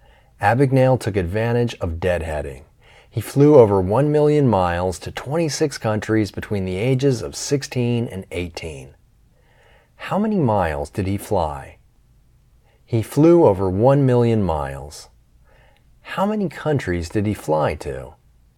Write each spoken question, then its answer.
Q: How many miles did he fly?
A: He flew over 1 million miles.

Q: How many countries did he fly to?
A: He flew to 26 countries.